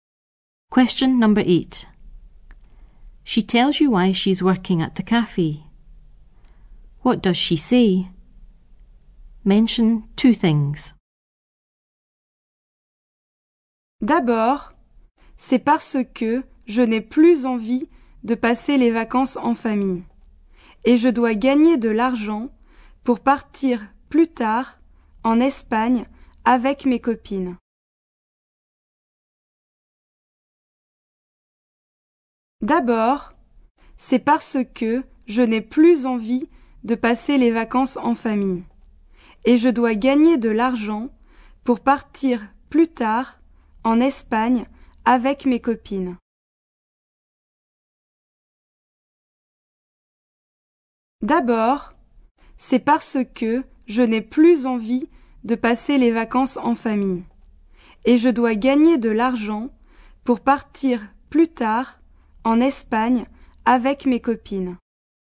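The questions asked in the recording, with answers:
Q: What does she say? Mention two things.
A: Doesn't want to holiday with family anymore; must earn money to go to Spain with friends later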